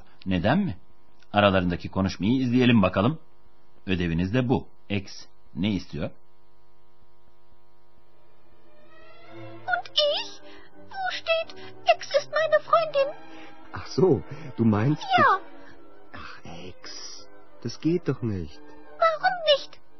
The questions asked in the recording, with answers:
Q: X ne istiyor?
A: Ex Andreas'ın mektupta kendisinden de söz etmesini istiyor.